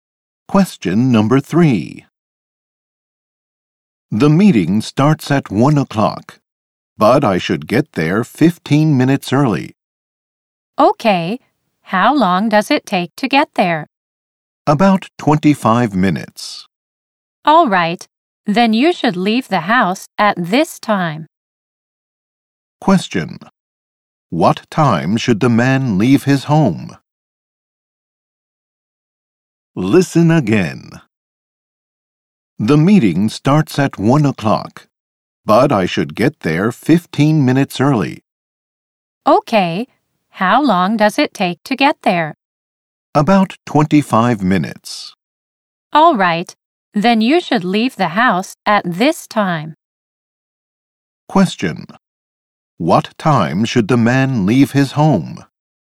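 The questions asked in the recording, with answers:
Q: What time should the man leave his home?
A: 12:20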